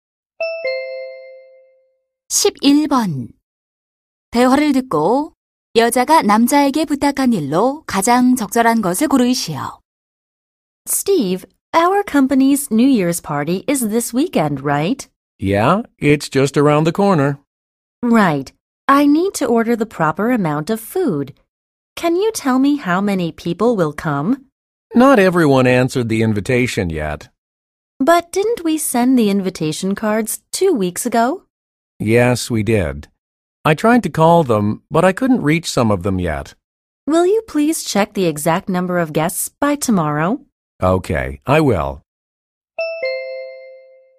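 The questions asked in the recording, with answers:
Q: 대화를 듣고 여자가 남자에게 부탁한 일로 가장 적절한 것을 고르시오.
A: 내일까지 정확한 참석 인원 확인하기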